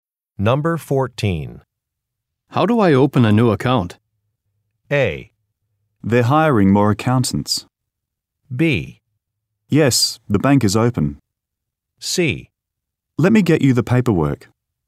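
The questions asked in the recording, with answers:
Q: How do I open a new account?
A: C: Let me get you the paperwork.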